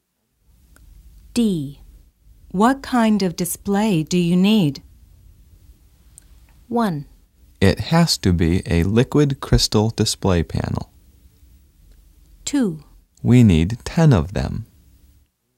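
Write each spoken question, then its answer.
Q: What kind of display do you need?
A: 1: It has to be a liquid crystal display panel.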